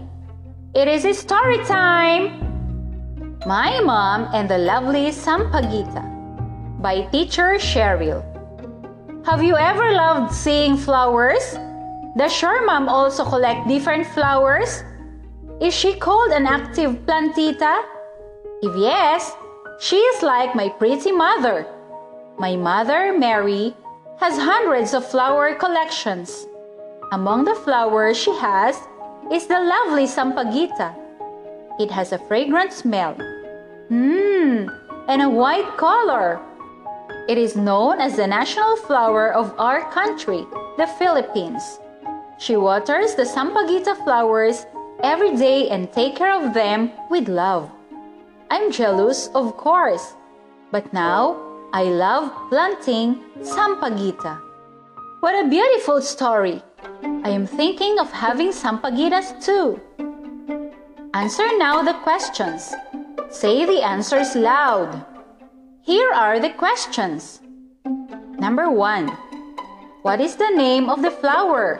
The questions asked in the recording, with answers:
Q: What is the name of the flower?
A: It's Sampaguita.